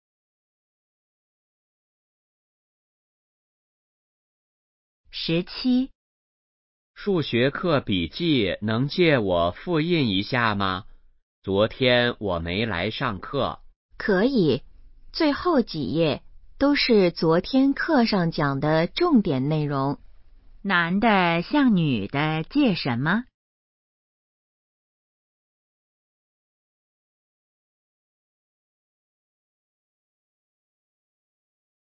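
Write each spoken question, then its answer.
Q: 男的向女的借什么?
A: 数学课笔记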